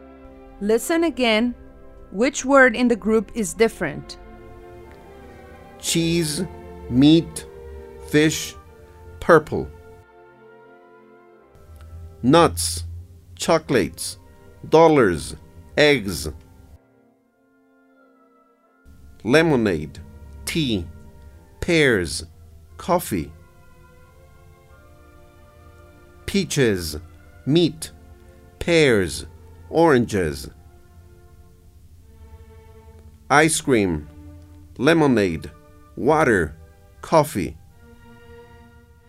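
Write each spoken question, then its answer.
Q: Cheese, meat, fish, purple.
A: purple

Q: Nuts, chocolates, dollars, eggs.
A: dollars

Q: Lemonade, tea, pears, coffee.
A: pears

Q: Peaches, meat, pears, oranges.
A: meat

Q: Ice cream, lemonade, water, coffee.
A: ice cream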